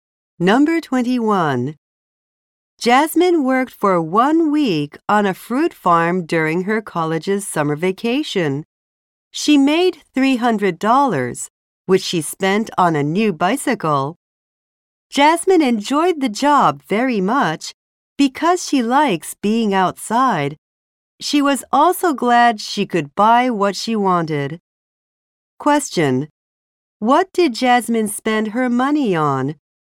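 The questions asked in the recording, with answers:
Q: What did Jasmine spend her money on?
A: A new bicycle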